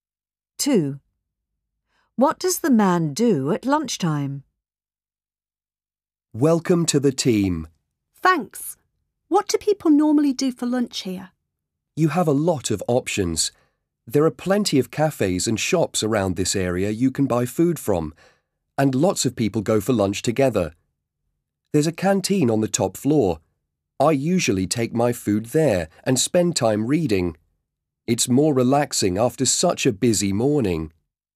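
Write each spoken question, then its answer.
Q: What does the man do at lunchtime?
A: He eats in the canteen and reads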